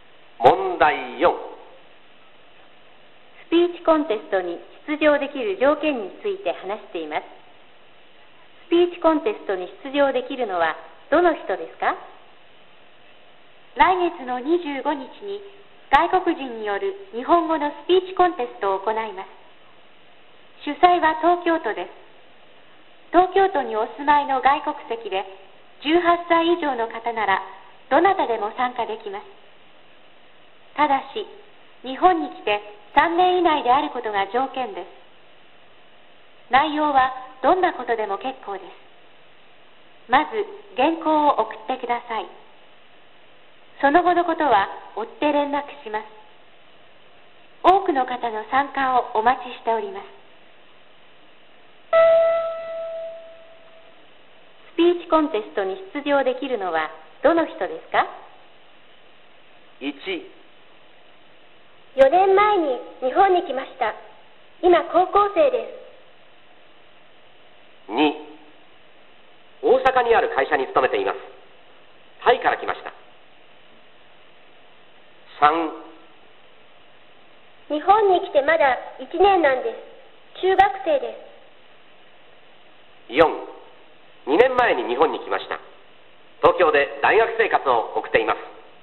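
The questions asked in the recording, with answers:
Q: スピーチコンテストに出場できるのはどの人ですか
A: 4: 2年前に日本に来ました東京で大学生活を送っています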